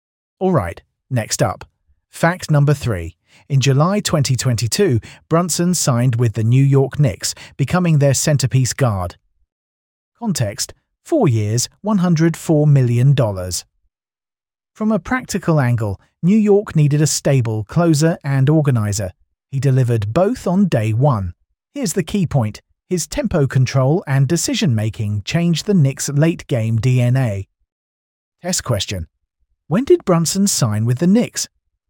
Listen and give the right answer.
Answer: Correct answer. July 2022.